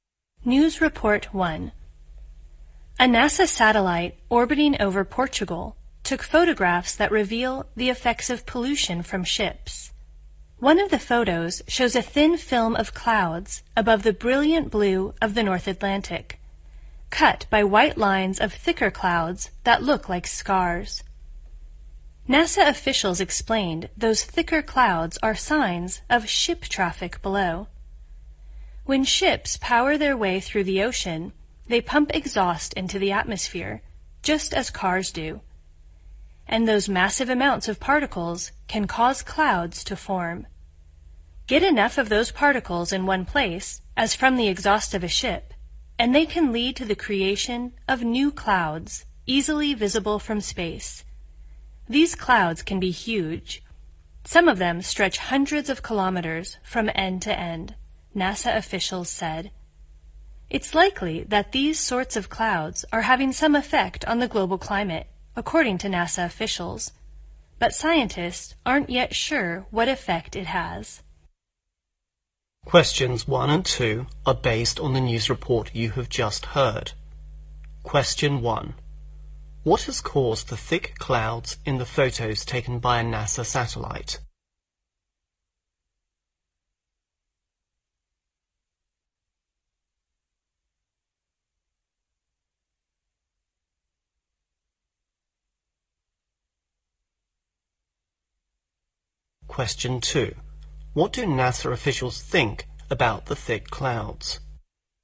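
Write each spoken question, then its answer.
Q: What has caused the thick clouds in the photos taken by a NASA satellite?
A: Exhaust from ships

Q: What do NASA officials think about the thick clouds?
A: They likely have some effect on the global climate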